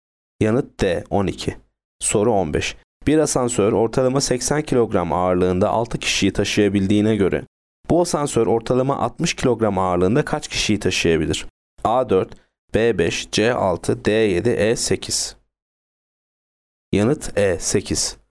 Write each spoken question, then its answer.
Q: Bir asansör ortalama 80 kilogram ağırlığında 6 kişiyi taşıyabildiğine göre bu asansör ortalama 60 kilogram ağırlığında kaç kişiyi taşıyabilir?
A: Yanıt E 8.